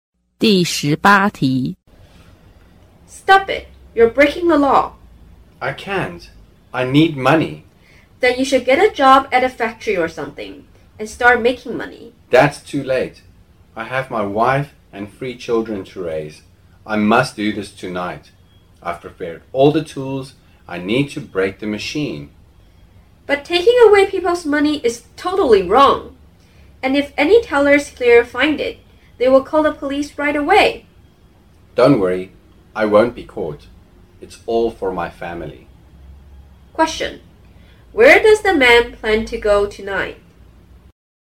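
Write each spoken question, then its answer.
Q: Where does the man plan to go tonight?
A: A bank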